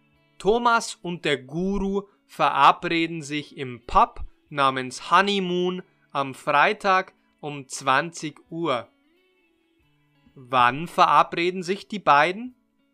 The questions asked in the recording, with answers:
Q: Wann verabreden sich die beiden?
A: Die beiden verabreden sich am Freitag um 20 Uhr.